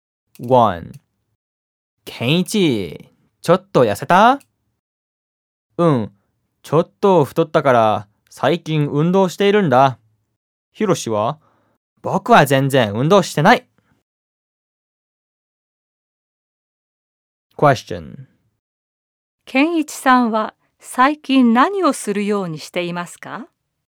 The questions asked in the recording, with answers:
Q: ケンイチさんは最近何をするようにしていますか?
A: ケンイチさんは最近運動するようにしています。